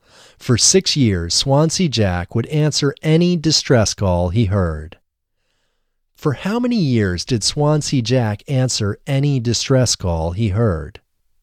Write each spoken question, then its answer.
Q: For how many years did Swansea Jack answer any distress call he heard?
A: Swansea Jack answered any distress call he heard for 6 years.